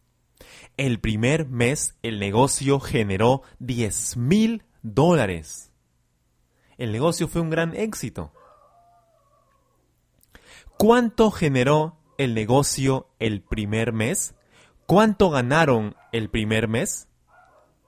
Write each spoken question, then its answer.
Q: ¿Cuánto generó el negocio el primer mes?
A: El negocio generó 10 mil dólares el primer mes.